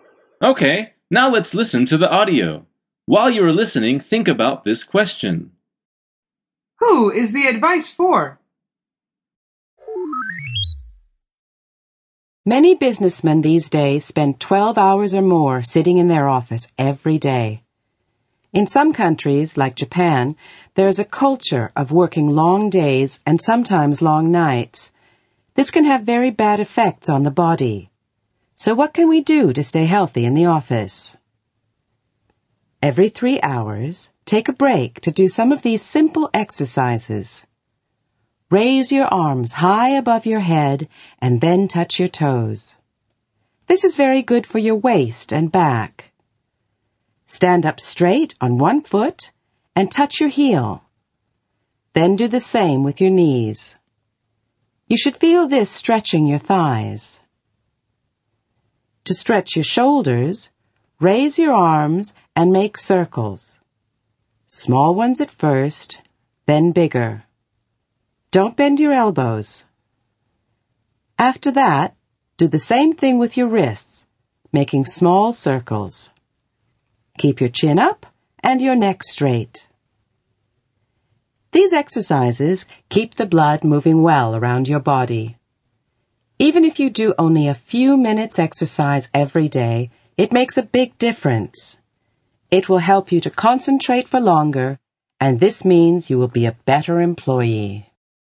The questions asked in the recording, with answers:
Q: Who is the advice for?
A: The answer is people who work in an office.